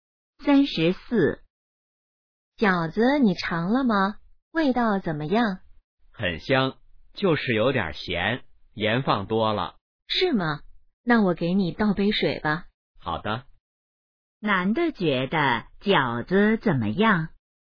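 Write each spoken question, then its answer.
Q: 男的觉得饺子怎么样?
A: 有点咸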